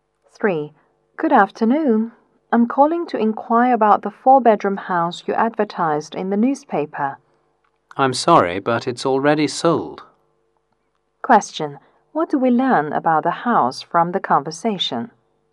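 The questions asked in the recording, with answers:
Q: What do we learn about the house from the conversation?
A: It has already been sold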